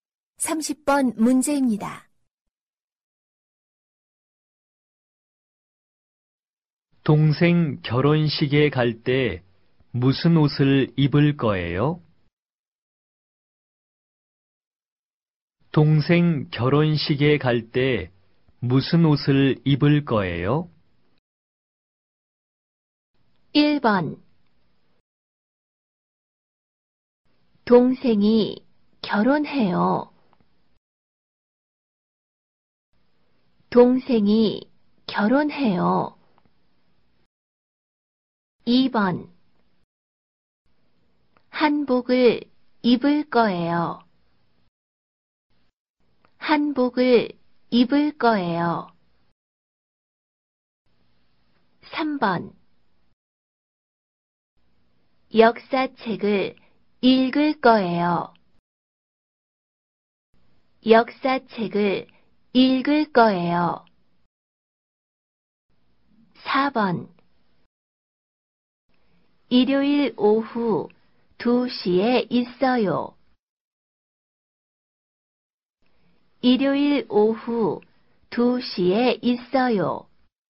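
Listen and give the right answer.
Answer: 2: 한복을 입을 거예요.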